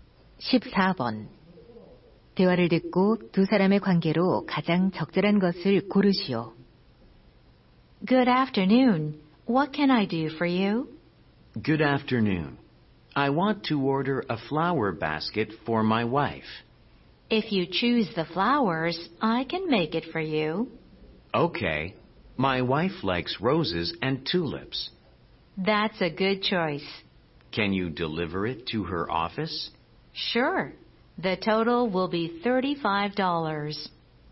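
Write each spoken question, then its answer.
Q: 대화를 듣고 두 사람의 관계로 가장 적절한 것을 고르시오.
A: 꽃집 주인 - 손님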